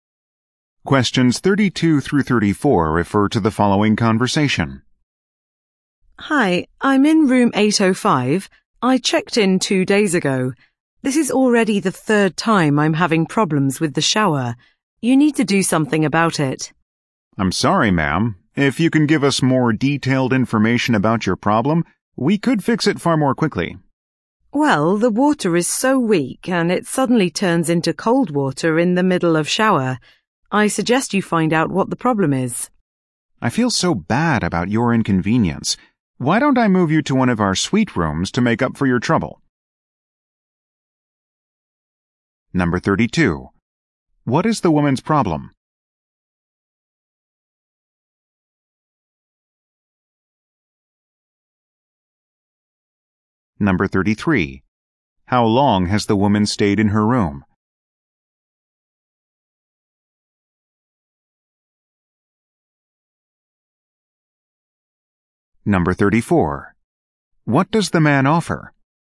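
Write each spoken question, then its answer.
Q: What is the woman's problem?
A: Her shower isn't working properly (weak water that turns cold)

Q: How long has the woman stayed in her room?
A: Two days

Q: What does the man offer?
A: To move her to a suite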